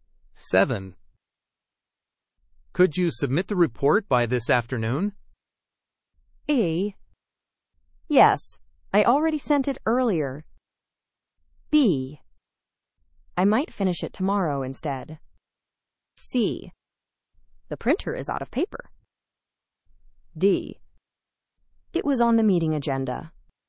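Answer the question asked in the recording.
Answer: A: Yes, I already sent it earlier.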